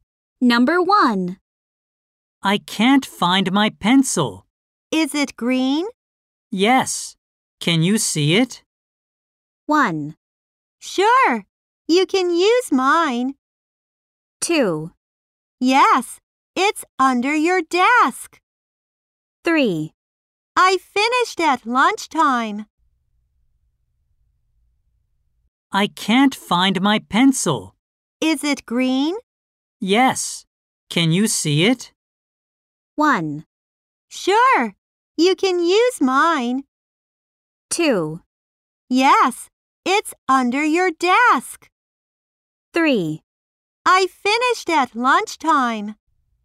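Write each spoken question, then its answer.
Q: Yes. Can you see it?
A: 2: Yes. It's under your desk.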